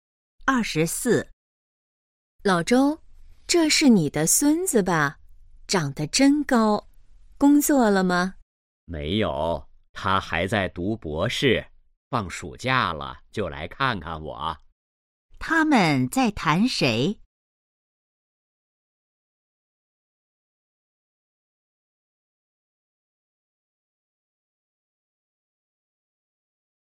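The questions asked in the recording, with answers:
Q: 他们在谈谁?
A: 老周的孙子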